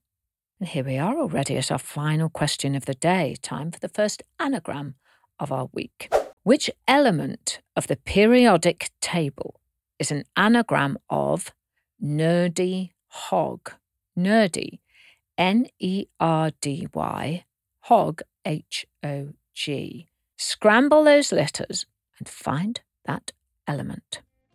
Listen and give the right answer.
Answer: hydrogen, H-Y-D-R-O-G-E-N.